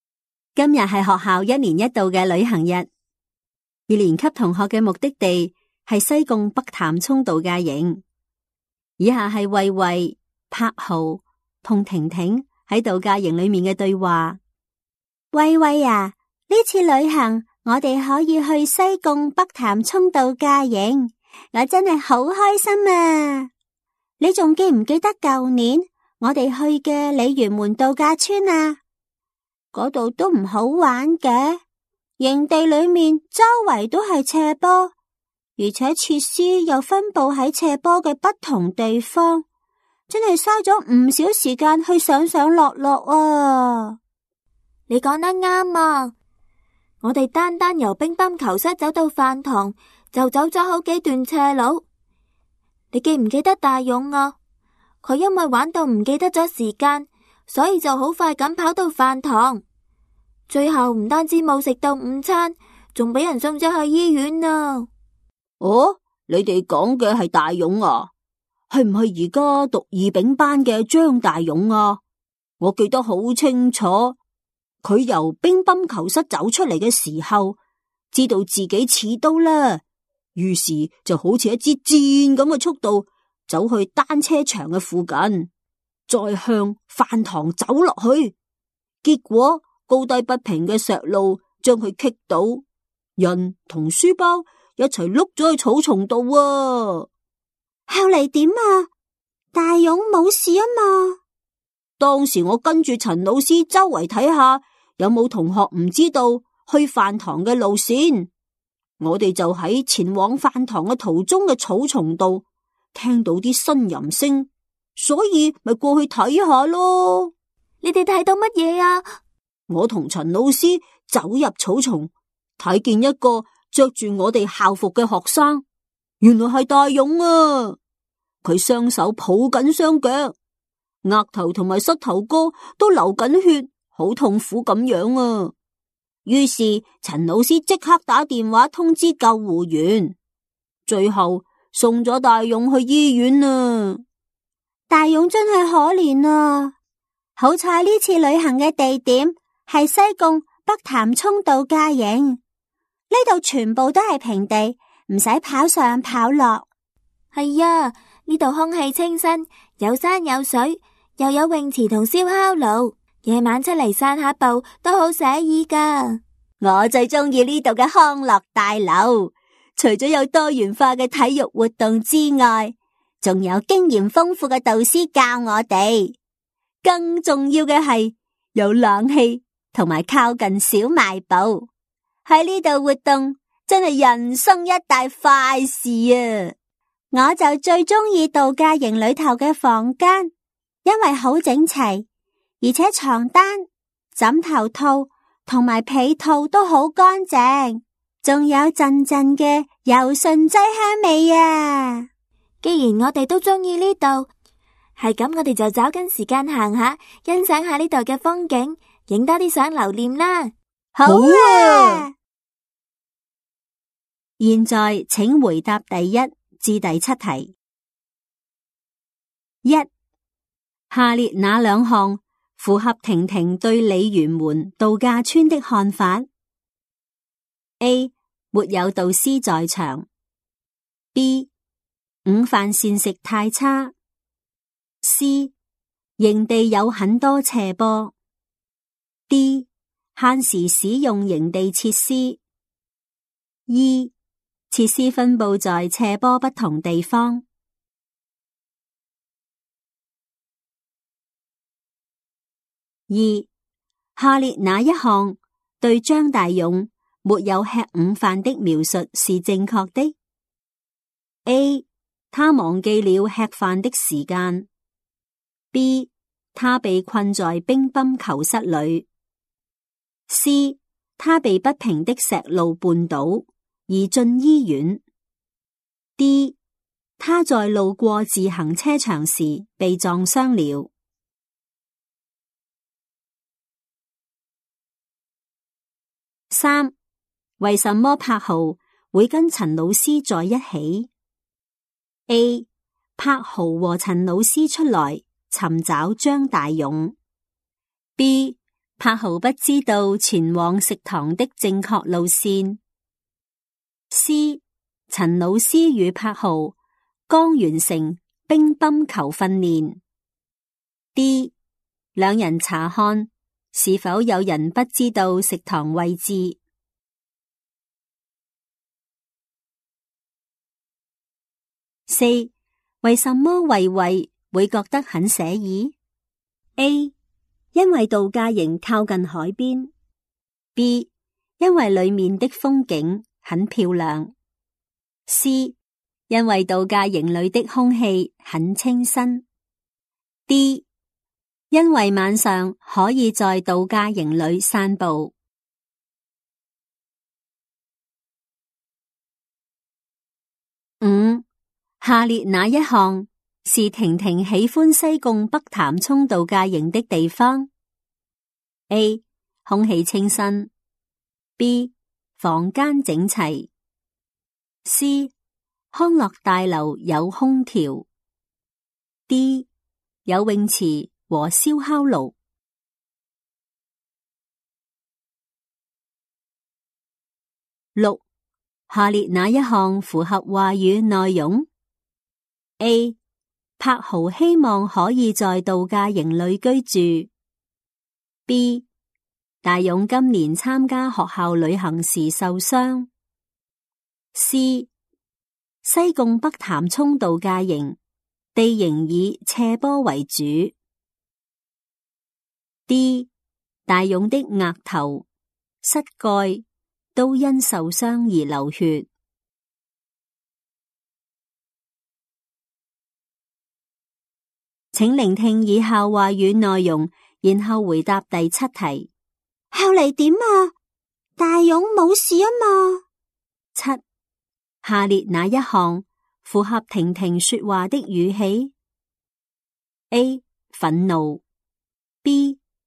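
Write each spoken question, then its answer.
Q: 下列哪两项符合婷婷对鲤鱼门度假村的看法?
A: C: 营地有很多斜坡。 E: 设施分布在斜坡不同地方。

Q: 为什么柏豪会跟陈老师在一起?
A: D: 两人查看是否有人不知道食堂位置。

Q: 为什么慧慧会觉得很惬意?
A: D: 因为晚上可以在度假营里散步。

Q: 下列哪一项符合话语内容?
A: D: 大勇的额头、膝盖都因受伤而流血。

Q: 下列哪一项符合婷婷说话的语气 ?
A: C: 担心。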